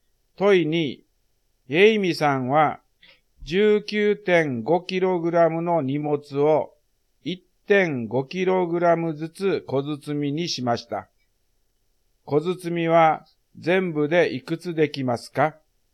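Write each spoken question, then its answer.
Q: 小包みは全部でいくつできますか?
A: 13個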